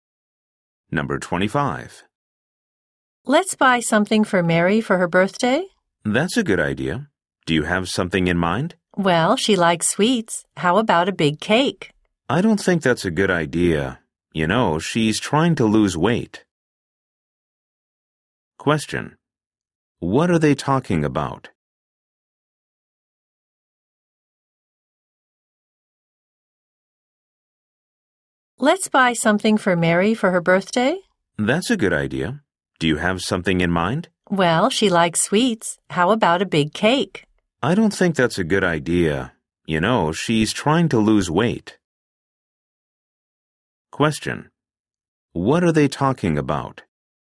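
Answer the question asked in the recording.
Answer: A birthday present for Mary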